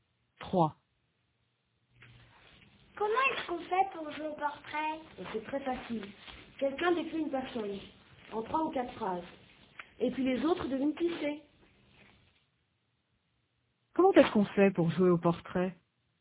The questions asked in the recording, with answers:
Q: Comment est-ce qu'on fait pour jouer au portrait?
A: Quelqu'un décrit une personne et les autres devinent qui c'est.